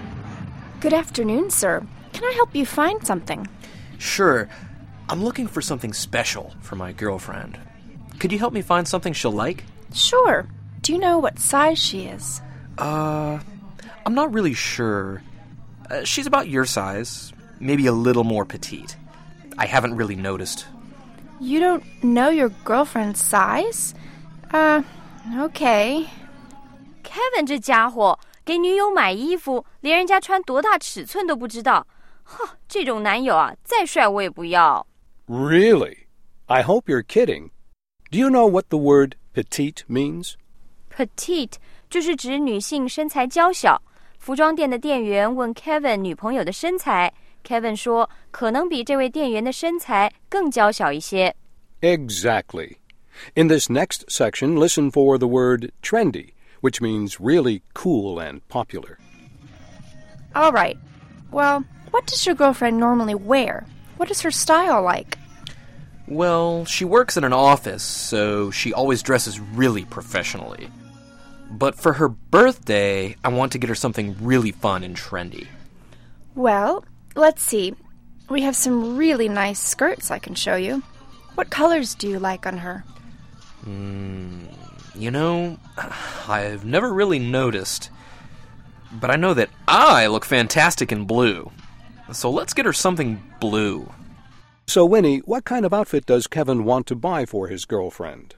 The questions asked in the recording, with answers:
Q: So, Winnie, what kind of outfit does Kevin want to buy for his girlfriend?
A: 他说女友平时在办公室都穿职业装,所以呢,想给她换个风格,来件活泼时髦的衣服。